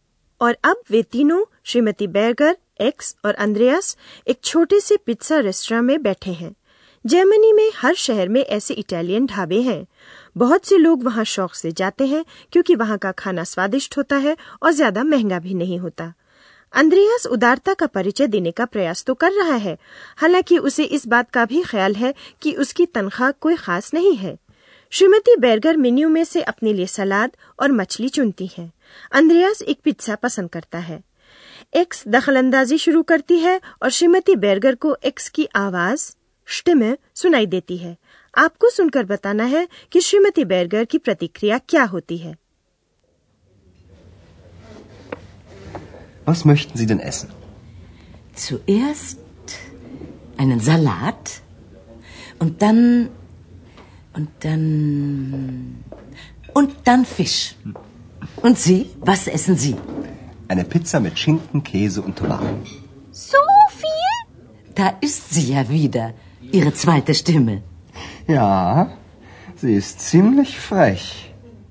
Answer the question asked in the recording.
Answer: वह अंद्रयास की दूसरी आवाज की बात करती हैं यानी मजा लेती हैं